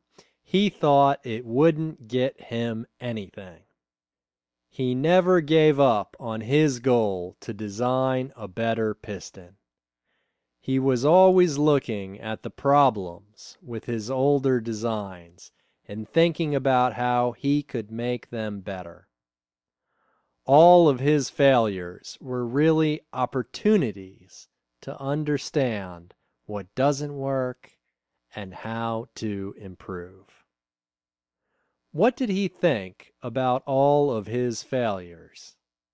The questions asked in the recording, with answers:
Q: What did he think about all of his failures?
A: He thought all of his failures were really opportunities to understand what doesn't work and how to improve.